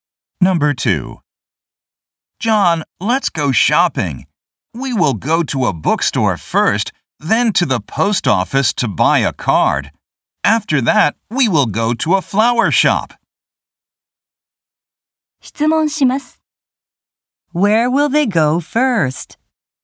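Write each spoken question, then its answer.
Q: Where will they go first?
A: To a bookstore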